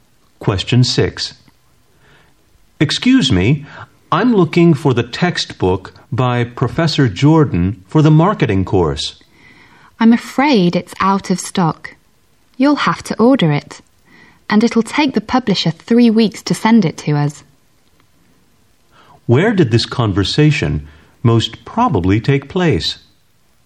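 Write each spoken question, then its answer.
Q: Where did this conversation most probably take place?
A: In a bookstore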